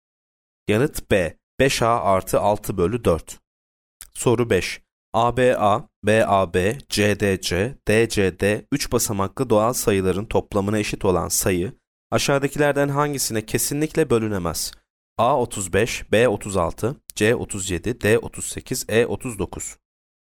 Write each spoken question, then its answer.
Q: ABA, BAB, CDC, DCD 3 basamaklı doğal sayıların toplamına eşit olan sayı aşağıdakilerden hangisine kesinlikle bölünemez?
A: Yanıt D 38.